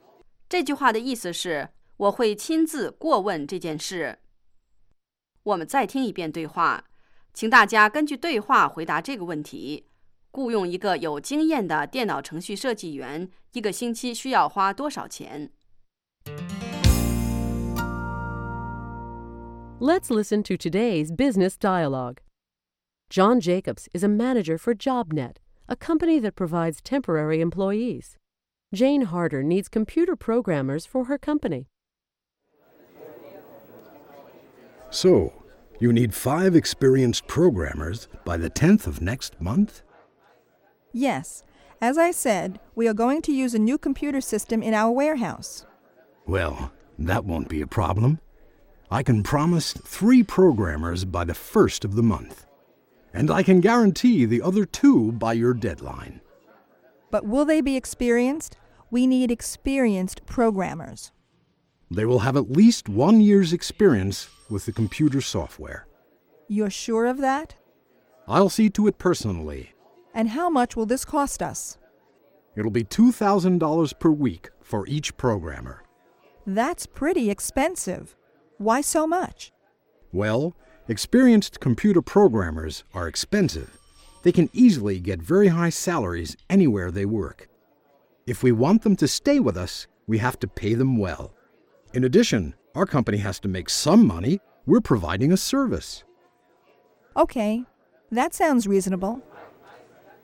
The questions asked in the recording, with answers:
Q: 雇用一个有经验的电脑程序设计员,一个星期需要花多少钱?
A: 2,000 per week for each programmer.